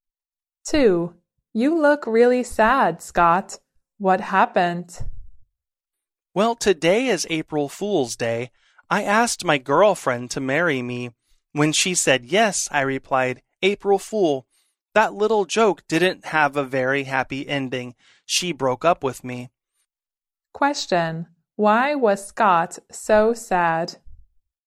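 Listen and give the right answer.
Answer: His girlfriend broke up with him after his April Fool joke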